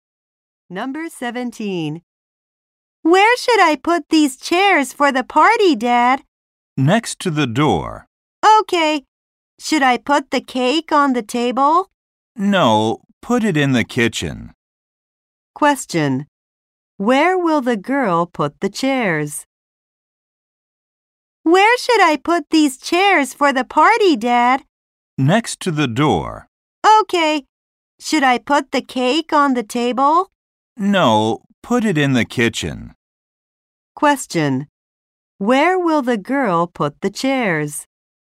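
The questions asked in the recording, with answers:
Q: Where will the girl put the chairs?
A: Next to the door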